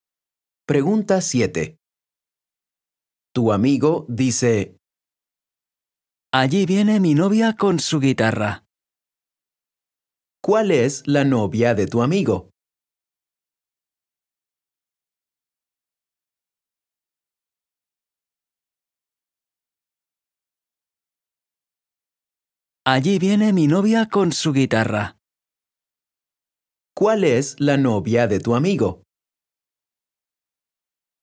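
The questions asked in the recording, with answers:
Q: ¿Cuál es la novia de tu amigo?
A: La que lleva una guitarra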